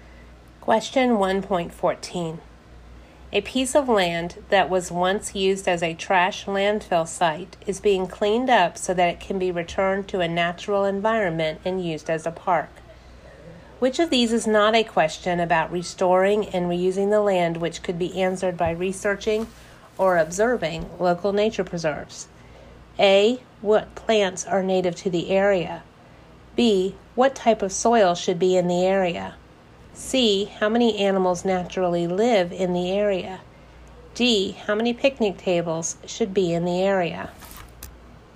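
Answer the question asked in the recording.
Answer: D: How many picnic tables should be in the area?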